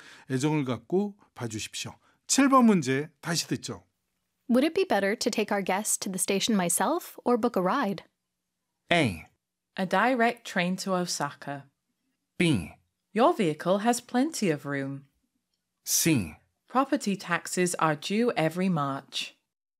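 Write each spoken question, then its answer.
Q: Would it be better to take our guests to the station myself or book a ride?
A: B: Your vehicle has plenty of room.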